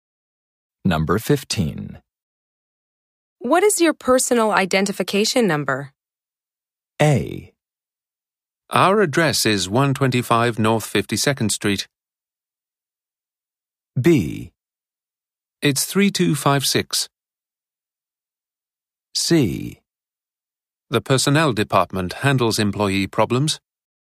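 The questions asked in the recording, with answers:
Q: What is your personal identification number?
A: B: It's 3256.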